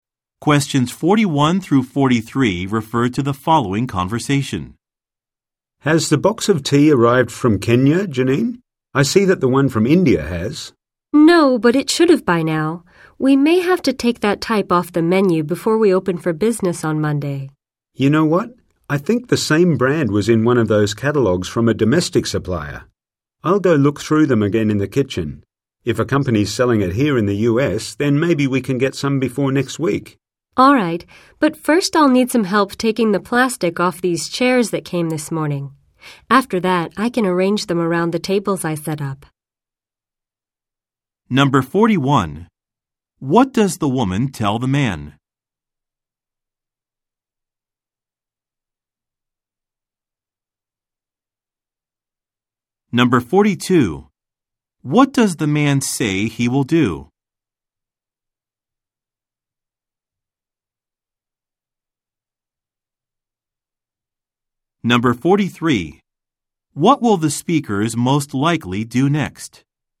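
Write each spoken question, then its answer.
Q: What does the woman tell the man?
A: The tea from Kenya has not arrived yet, though it should have.

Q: What will the speakers most likely do next?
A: Take the plastic off the new chairs.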